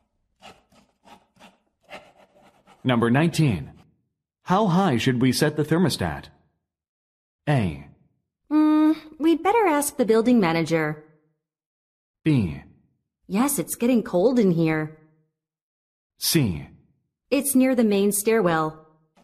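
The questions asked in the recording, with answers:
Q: How high should we set the thermostat?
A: A: We'd better ask the building manager.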